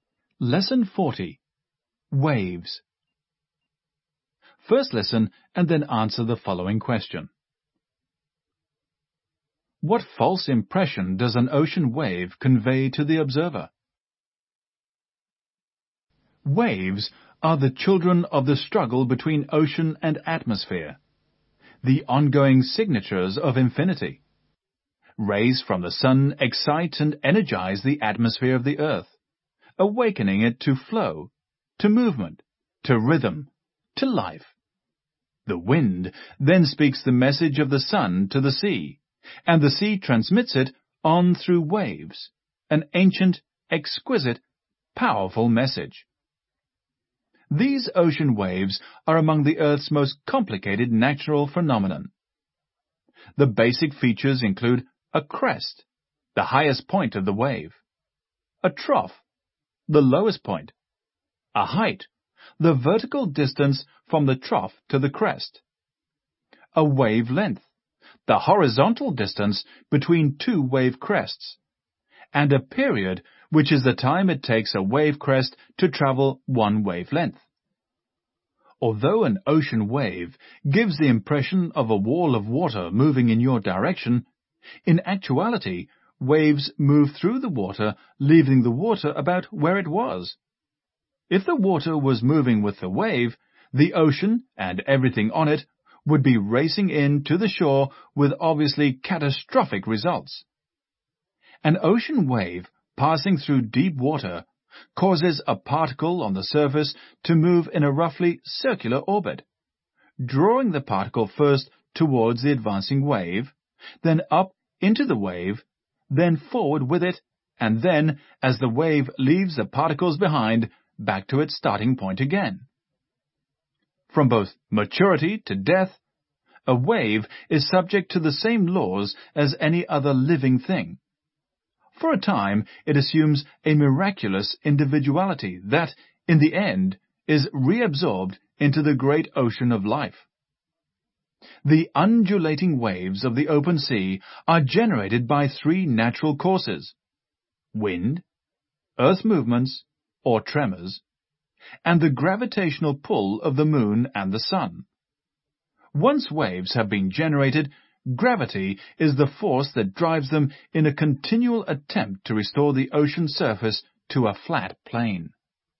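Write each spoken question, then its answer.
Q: What false impression does an ocean wave convey to the observer?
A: That a wall of water is moving toward the observer, when in fact waves move through the water and leave it about where it was.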